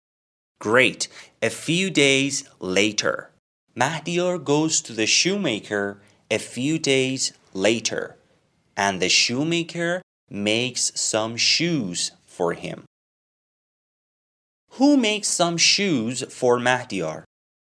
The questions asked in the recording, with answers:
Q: Who makes some shoes for Mahdiyar?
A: The shoemaker makes shoes for Mahdiyar.